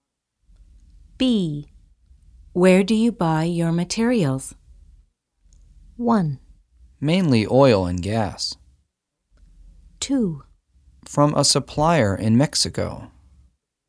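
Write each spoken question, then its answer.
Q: Where do you buy your materials?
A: 2: From a supplier in Mexico.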